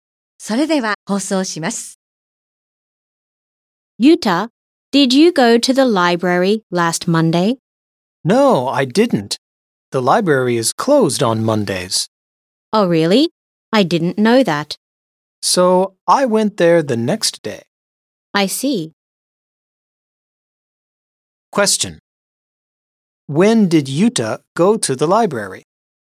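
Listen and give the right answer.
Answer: Last Tuesday (the day after Monday)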